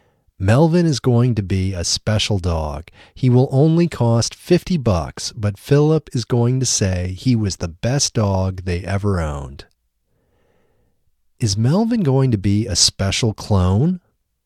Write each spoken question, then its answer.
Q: Is Melvin going to be a special clone?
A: No, Melvin isn't going to be a special clone.